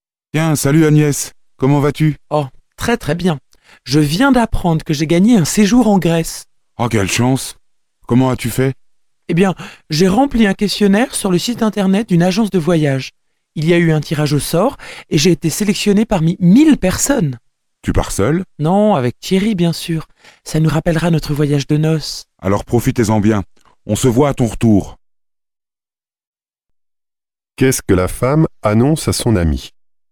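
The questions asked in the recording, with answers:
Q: Qu'est-ce que la femme annonce à son ami?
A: Elle a gagné un séjour en Grèce.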